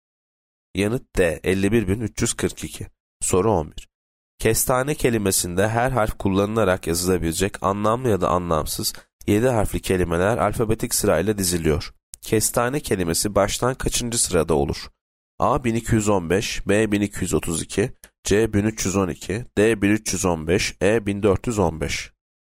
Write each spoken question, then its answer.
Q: Kestane kelimesi baştan kaçıncı sırada olur?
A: Yanıt B 1232.